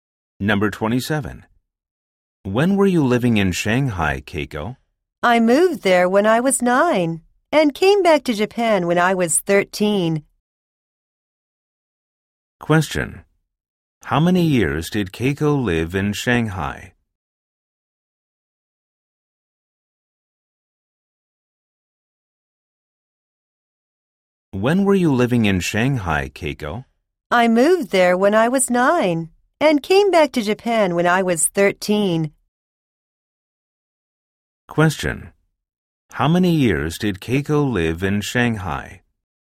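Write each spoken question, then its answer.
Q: How many years did Keiko live in Shanghai?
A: Four years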